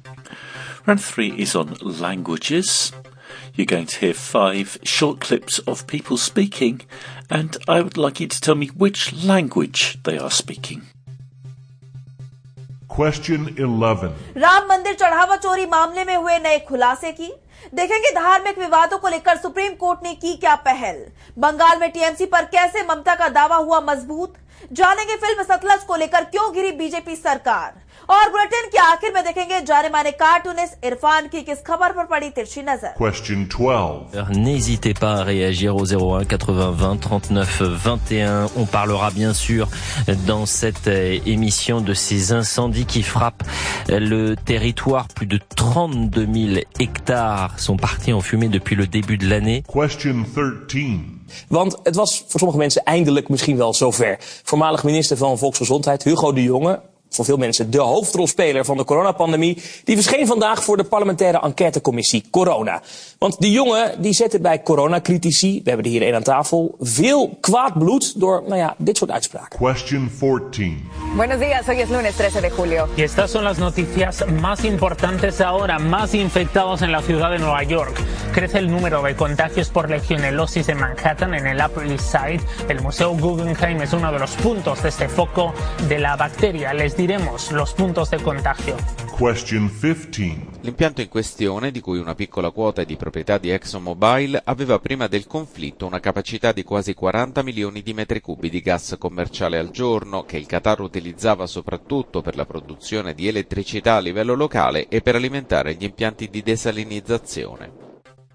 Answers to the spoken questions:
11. the answer to number 11 was Hindi.
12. Number 12 was French.
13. Number 13 was Dutch.
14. Number 14 was Spanish.
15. And number 15 was Italian.